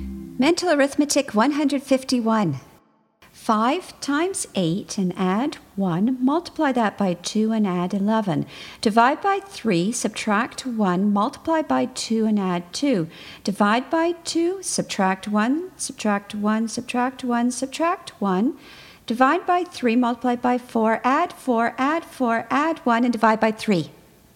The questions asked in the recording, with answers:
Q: 5 times 8 and add 1, multiply that by 2 and add 11. Divide by 3, subtract 1, multiply by 2 and add 2. Divide by 2, subtract 1, subtract 1, subtract 1, subtract 1. Divide by 3, multiply by 4, add 4, add 4, add 1, and divide by 3.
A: And the answer is 15.